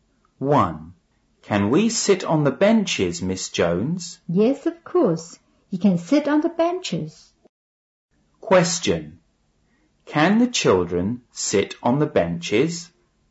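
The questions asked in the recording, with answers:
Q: Question. Can the children sit on the benches?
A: Yes, they can.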